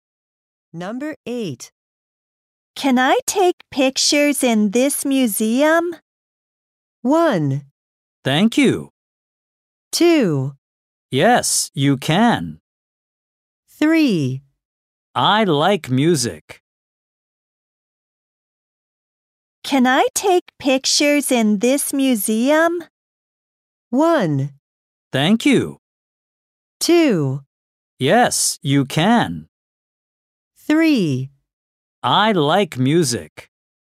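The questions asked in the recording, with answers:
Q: Can I take pictures in this museum?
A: 2: Yes, you can.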